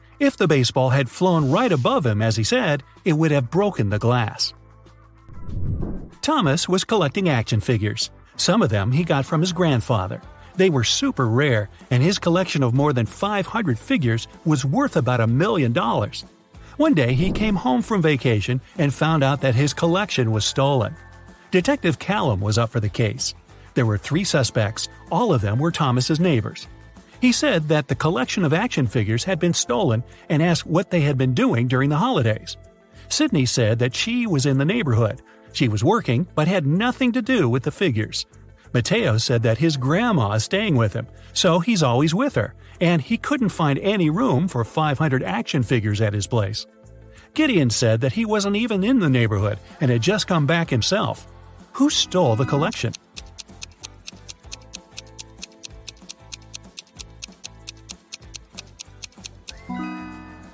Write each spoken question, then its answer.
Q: Who stole the collection?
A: Mateo.